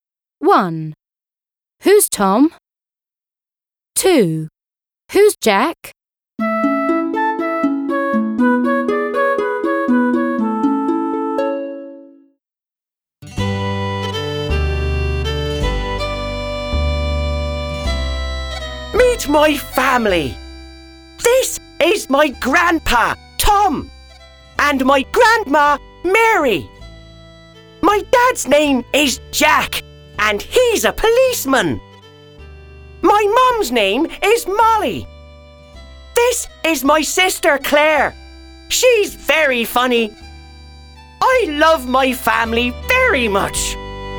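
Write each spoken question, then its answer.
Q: Who's Tom?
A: He's the grandpa.

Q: Who's Jack?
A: He's the dad; he's a policeman.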